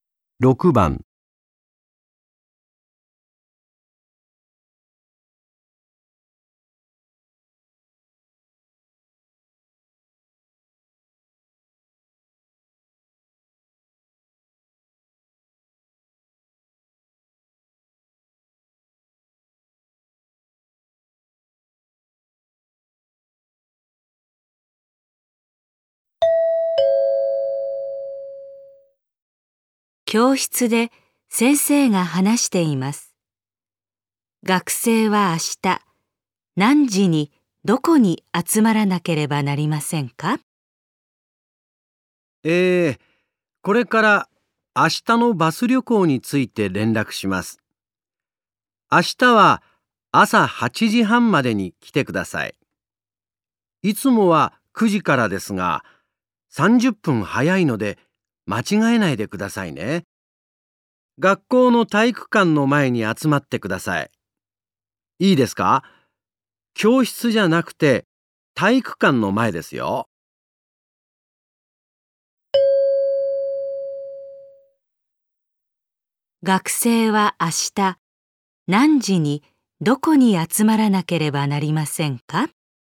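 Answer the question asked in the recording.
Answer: 8時半に体育館の前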